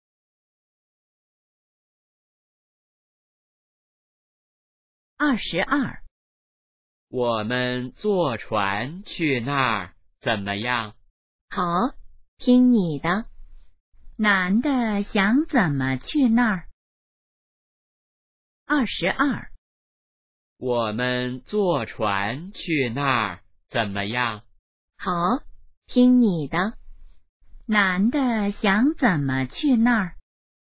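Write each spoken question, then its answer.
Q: 男的想怎么去那儿?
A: 坐船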